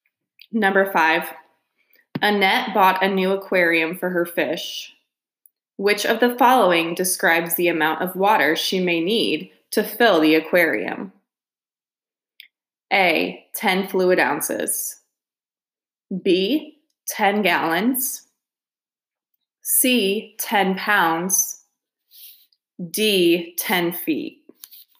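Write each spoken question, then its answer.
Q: Which of the following describes the amount of water she may need to fill the aquarium?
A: B: 10 gallons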